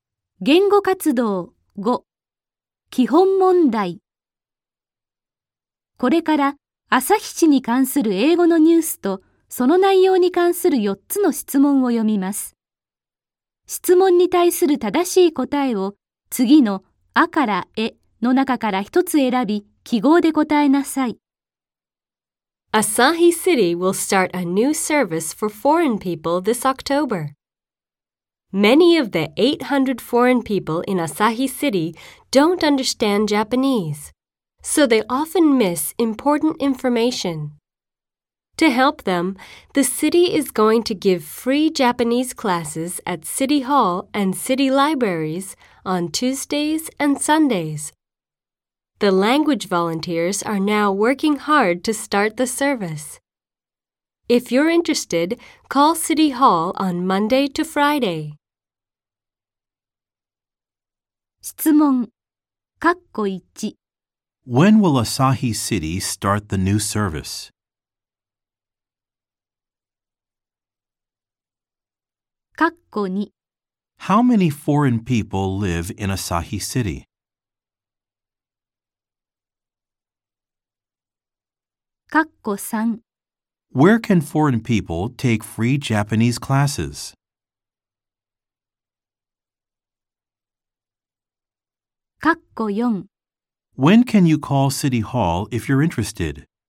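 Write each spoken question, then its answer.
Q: When will Asahi City start the new service?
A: This October

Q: How many foreign people live in Asahi City?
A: 800

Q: Where can foreign people take free Japanese classes?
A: At City Hall and City Libraries

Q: When can you call City Hall if you're interested?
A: Monday to Friday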